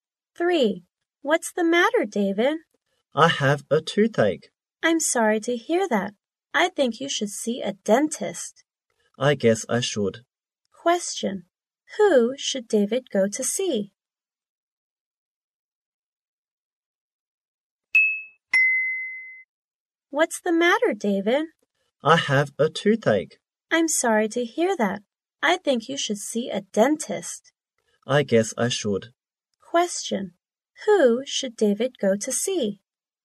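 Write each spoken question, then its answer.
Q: Who should David go to see?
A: A dentist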